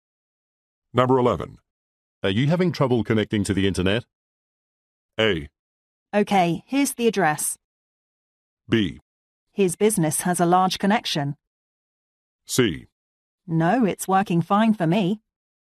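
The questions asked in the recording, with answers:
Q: Are you having trouble connecting to the internet?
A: C: No, it's working fine for me.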